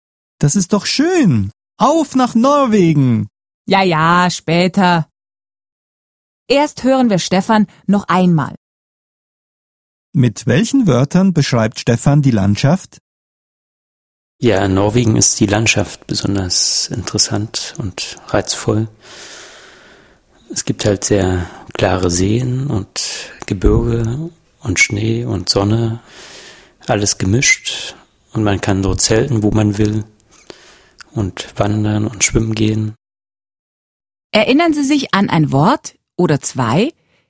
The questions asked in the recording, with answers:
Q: Mit welchen Wörtern beschreibt Stefan die Landschaft?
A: Die Landschaft ist interessant.